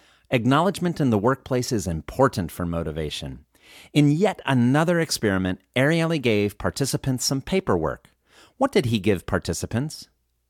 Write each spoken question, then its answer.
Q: What did he give participants?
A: He gave participants some paperwork.